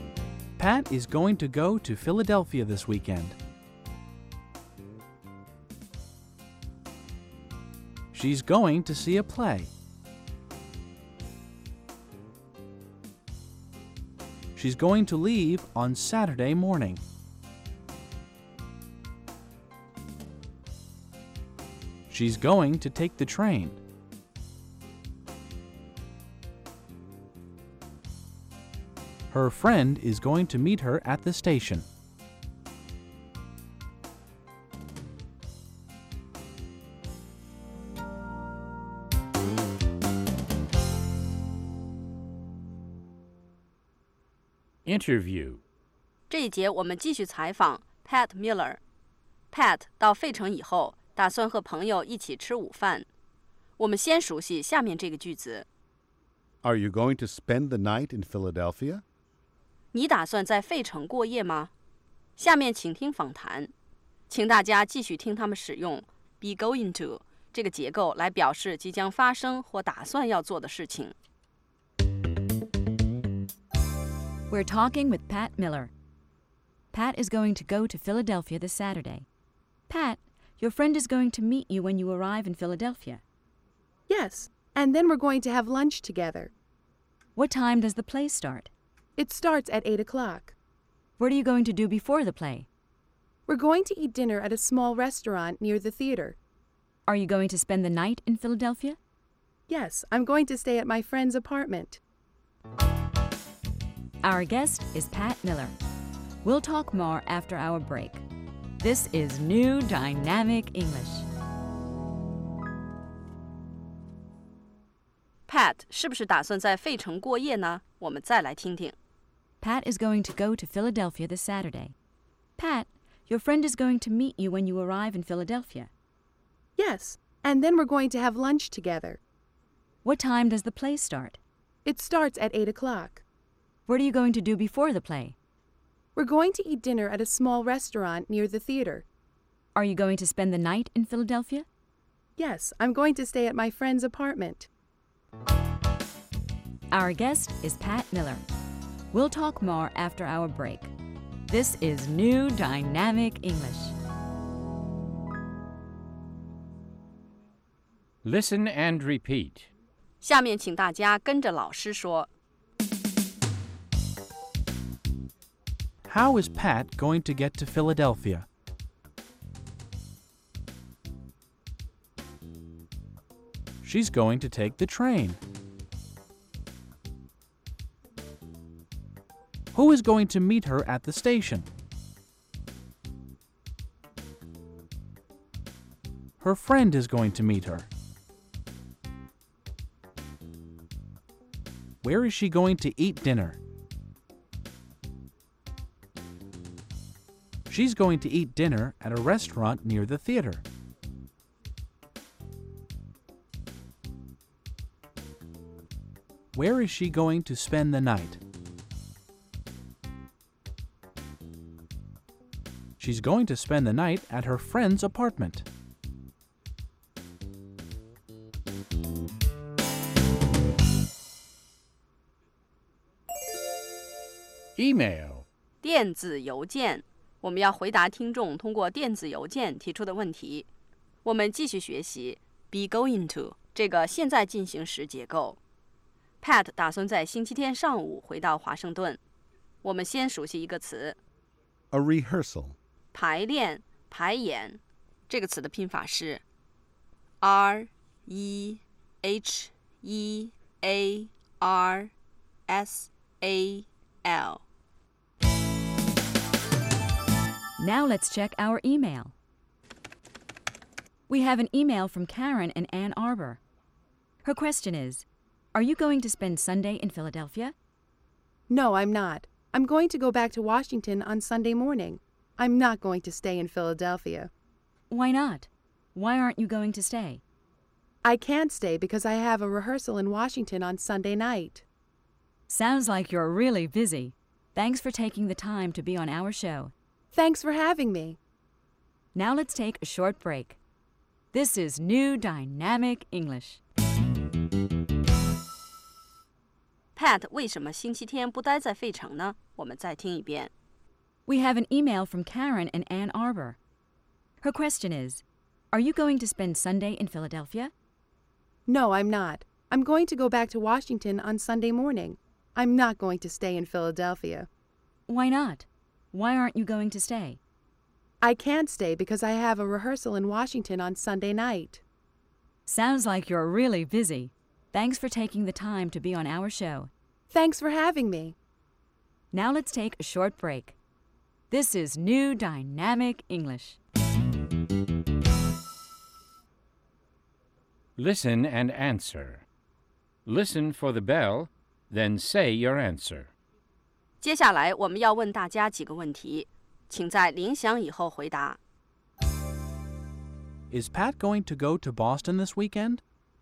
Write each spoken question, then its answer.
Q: Is Pat going to go to Boston this weekend?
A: No, she isn't. She isn't going to go to Boston.